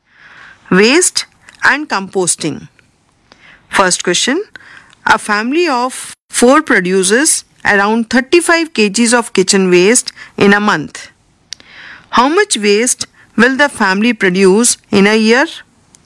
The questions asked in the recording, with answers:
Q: How much waste will the family produce in a year?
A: So, on adding, the total is 420 kg.